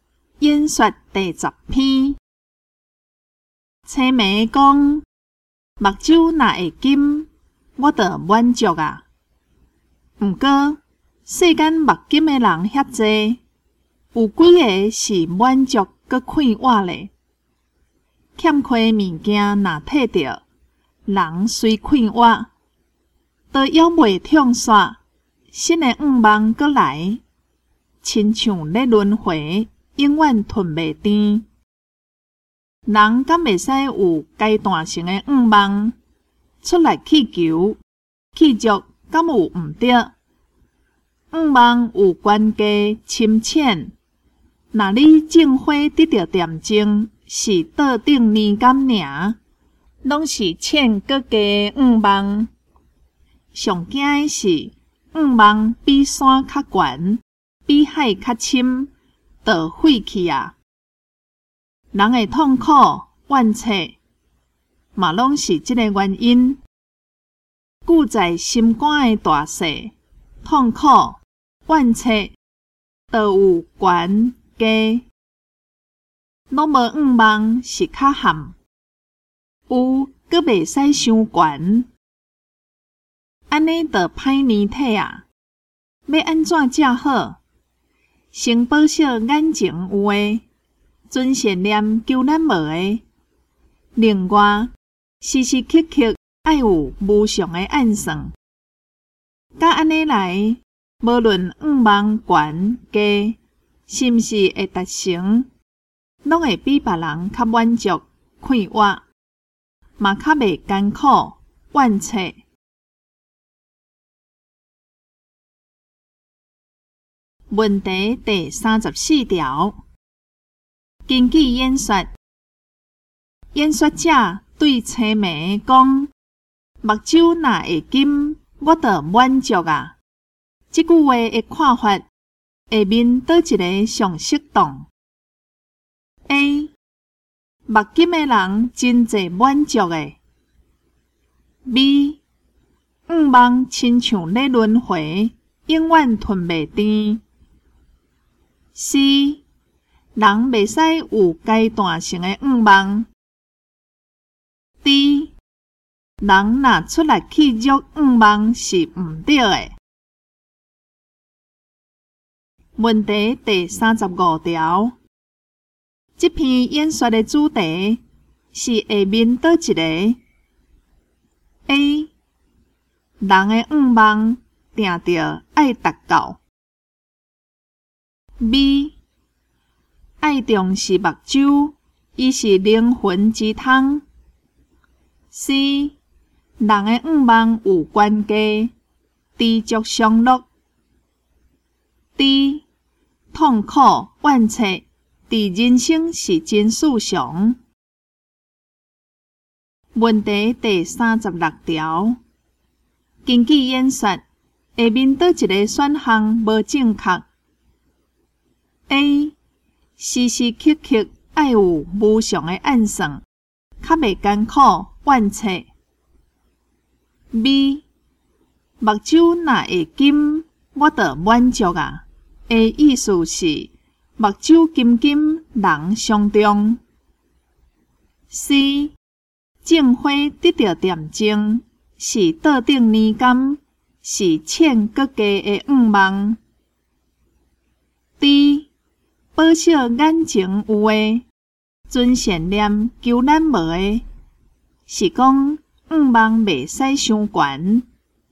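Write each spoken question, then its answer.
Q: 根据演说,演说者对青梅讲:"目睭若会金,我就满足啊。"这句话的看法,下面倒一个上适当 ?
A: B: 愿望亲像咧轮回,永远吞袂甜。

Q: 这篇演说的主题是下面哪一个?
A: C: 人的愿望有关家,知足常乐。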